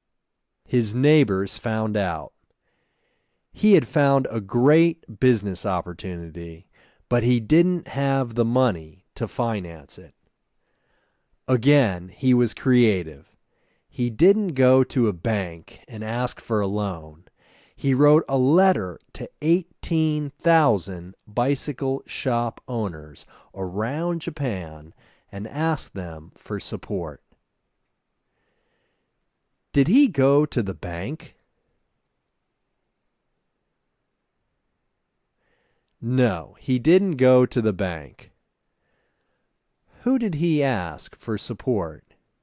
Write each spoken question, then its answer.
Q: Did he go to the bank?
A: No, he didn't go to the bank.

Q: Who did he ask for support?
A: He asked 18,000 bicycle shop owners for support.